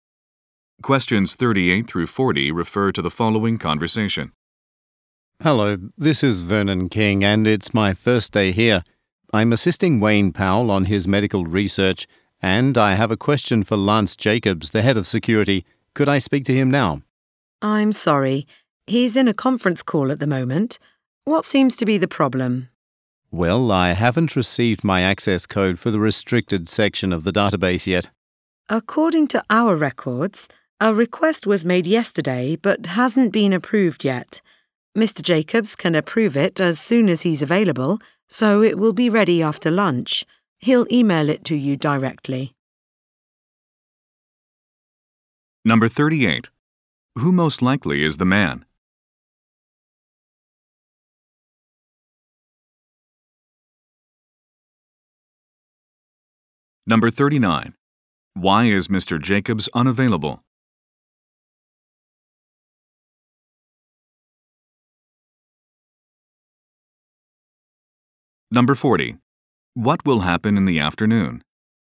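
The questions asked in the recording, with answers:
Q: Who most likely is the man?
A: A new research assistant

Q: Why is Mr. Jacobs unavailable?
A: He is on a conference call

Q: What will happen in the afternoon?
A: The access code will be emailed to him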